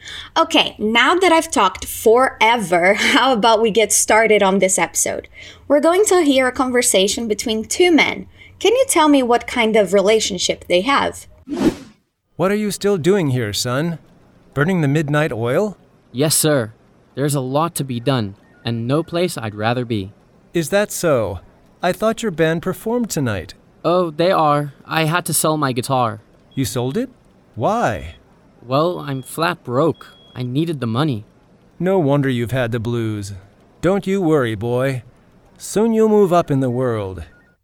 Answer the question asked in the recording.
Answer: It seems that they are boss and employee.